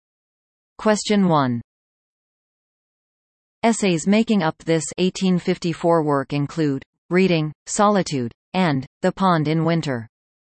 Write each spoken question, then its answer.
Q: Essays making up this 1854 work include Reading, Solitude, and The Pond in Winter.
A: The answer is Walden, or Life in the Woods.